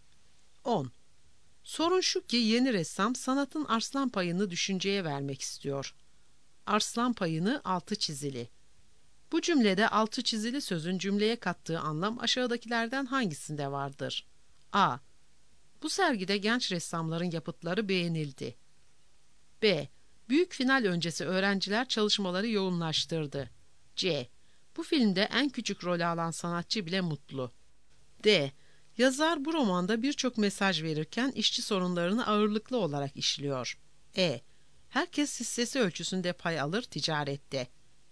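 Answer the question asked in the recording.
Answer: D: Yazar bu romanda birçok mesaj verirken işçi sorunlarını ağırlıklı olarak işliyor.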